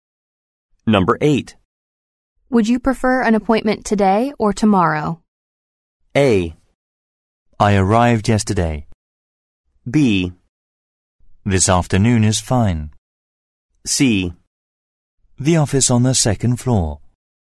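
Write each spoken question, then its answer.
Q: Would you prefer an appointment today or tomorrow?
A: B: This afternoon is fine.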